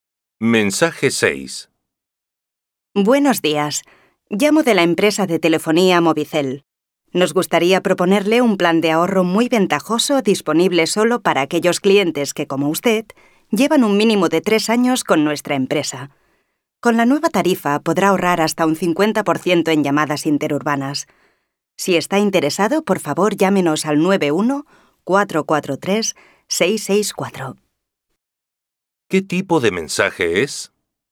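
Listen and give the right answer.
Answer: Publicitario: una oferta comercial de una compañía telefónica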